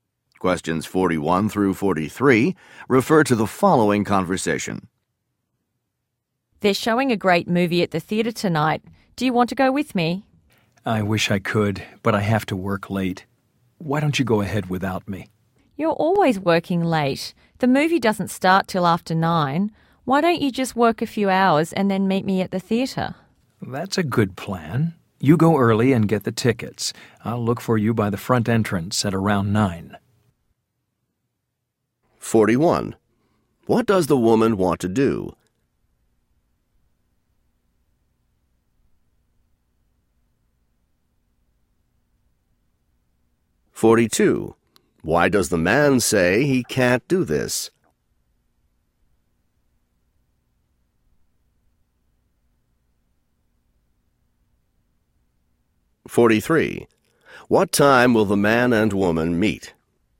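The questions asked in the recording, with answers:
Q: What does the woman want to do?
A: Go to a movie at the theatre

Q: Why does the man say he can't do this?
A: He has to work late

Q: What time will the man and woman meet?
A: Around nine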